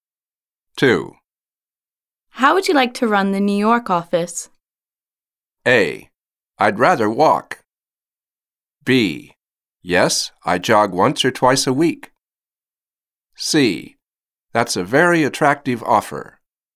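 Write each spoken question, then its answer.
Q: How would you like to run the New York office?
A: C: That's a very attractive offer.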